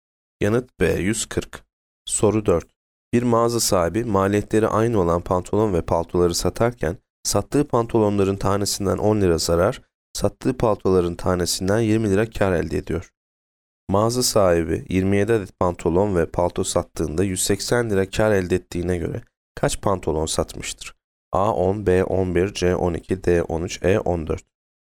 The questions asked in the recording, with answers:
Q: Mağaza sahibi 27 adet pantolon ve palto sattığında 180 lira kar elde ettiğine göre kaç pantolon satmıştır?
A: Yanıt C 12.